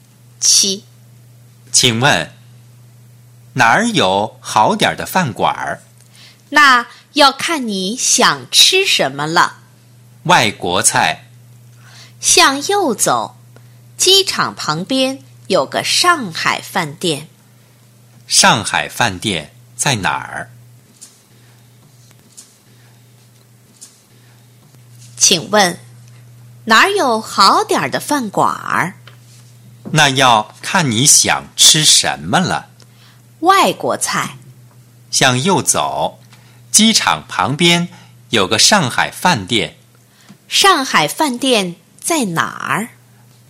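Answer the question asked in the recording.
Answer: 机场旁边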